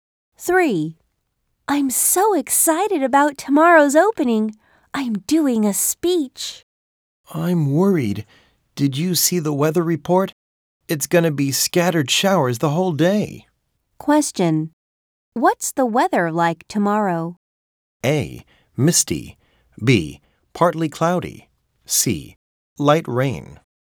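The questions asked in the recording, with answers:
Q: What's the weather like tomorrow?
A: C: Light rain.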